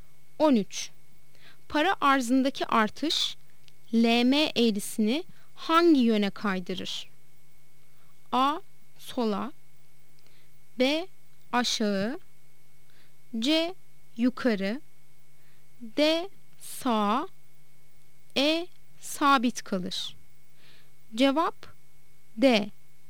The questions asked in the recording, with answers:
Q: Para arzındaki artış LM eğrisini hangi yöne kaydırır?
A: Cevap D. Sağ.